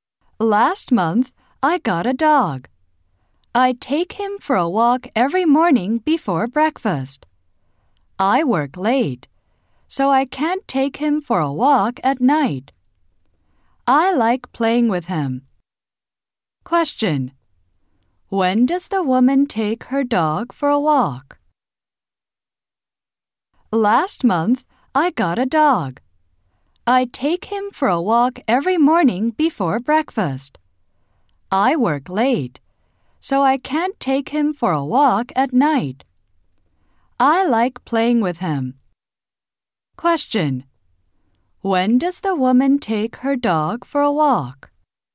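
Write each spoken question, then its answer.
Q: When does the woman take her dog for a walk?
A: Every morning before breakfast.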